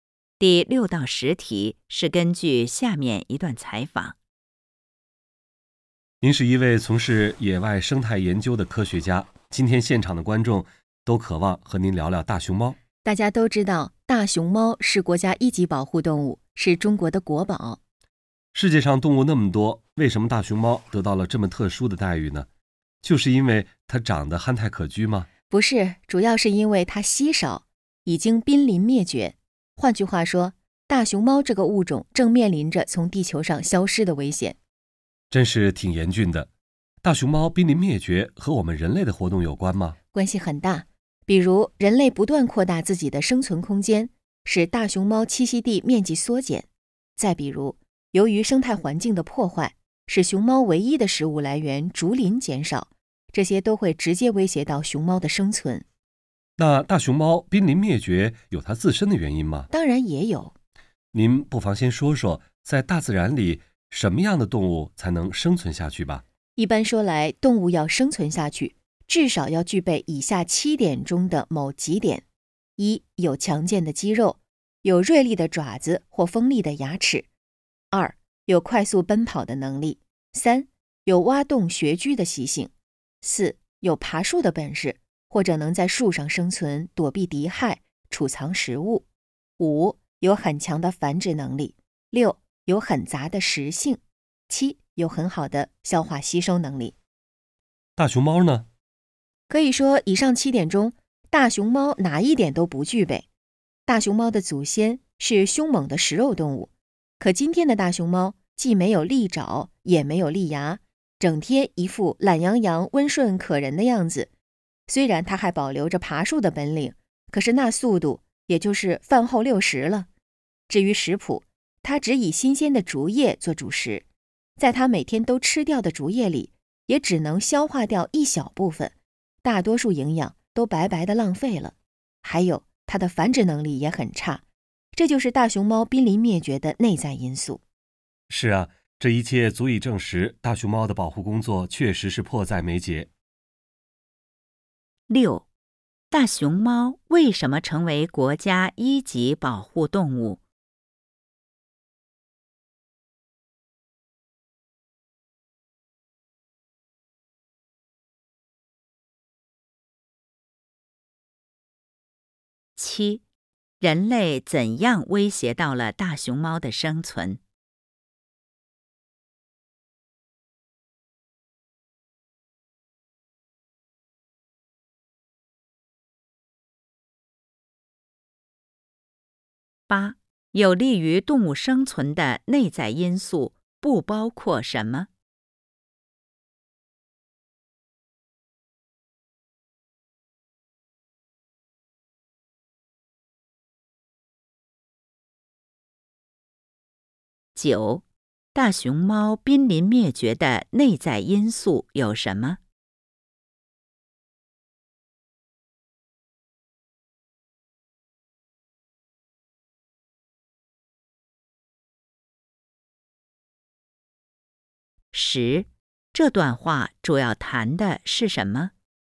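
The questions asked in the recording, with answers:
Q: 大熊猫为什么成为国家一级保护动物?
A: 因为它稀少,已经濒临灭绝

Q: 人类怎样威胁到了大熊猫的生存?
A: 扩大生存空间使栖息地缩减,破坏生态环境使竹林减少

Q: 大熊猫濒临灭绝的内在因素有什么?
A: 没有利爪利牙、爬树慢、食性单一、消化能力差、繁殖能力差

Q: 这段话主要谈的是什么?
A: 大熊猫濒临灭绝的原因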